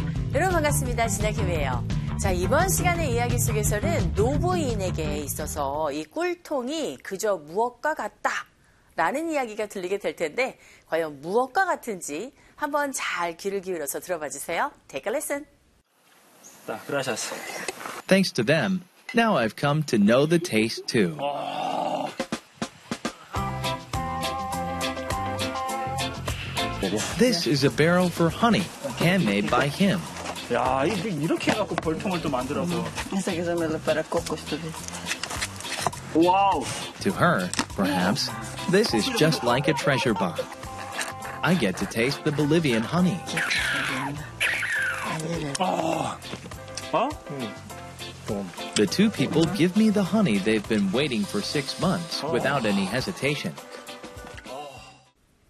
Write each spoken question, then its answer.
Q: 이번 시간의 이야기 속에서는 노부인에게 있어서 이 꿀통이 그저 무엇과 같다 라는 이야기가 들리게 될 텐데 과연 무엇과 같은지 한번 잘 귀를 기울여서 들어봐 주세요.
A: To her, this is, right, like a treasure box 라고 여러분들 캐치하셨겠죠?